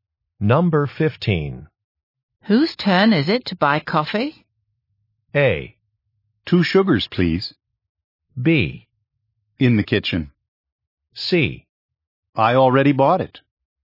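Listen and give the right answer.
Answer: C: I already bought it.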